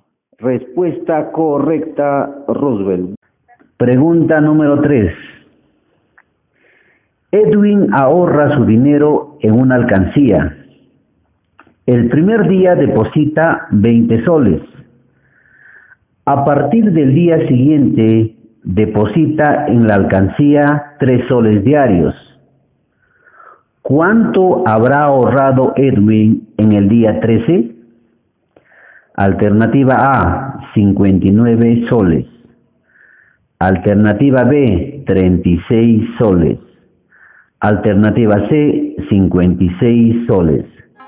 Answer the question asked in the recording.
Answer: La C.